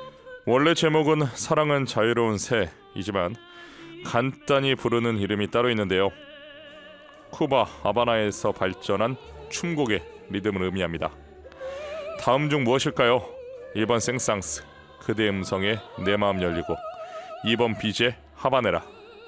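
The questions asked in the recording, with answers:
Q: 다음 중 무엇일까요? 1번 생상스, 그대 음성에 내 마음 열리고, 2번 비제 하바네라.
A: 2: 비제 하바네라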